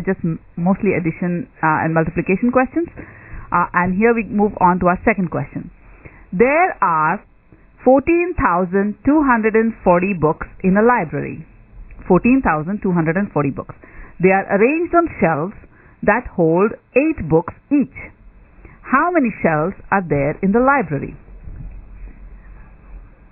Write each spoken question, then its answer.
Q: How many shelves are there in the library?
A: 1,780.